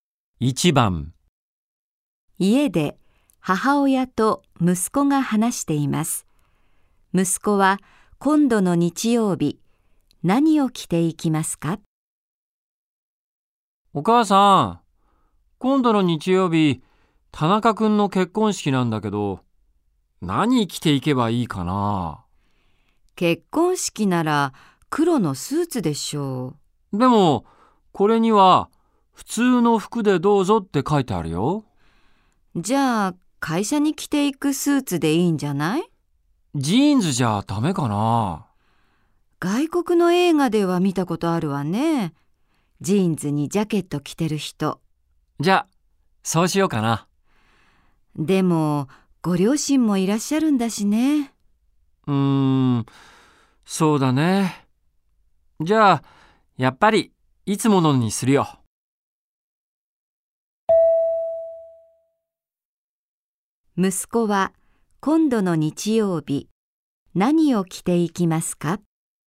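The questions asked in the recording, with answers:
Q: 息子は今度の日曜日何を着ていきますか?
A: いつも会社に着ていくスーツ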